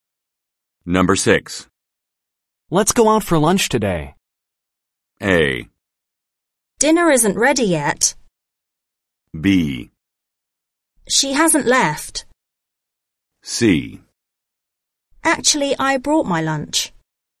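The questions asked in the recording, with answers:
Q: Let's go out for lunch today.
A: C: Actually, I brought my lunch.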